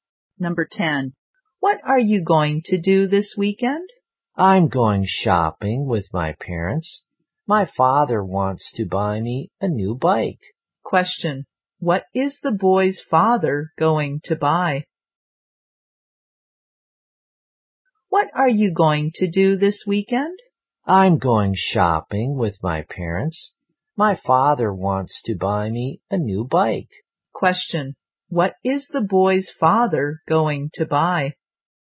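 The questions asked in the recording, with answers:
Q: Question. What is the boy's father going to buy?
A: A new bike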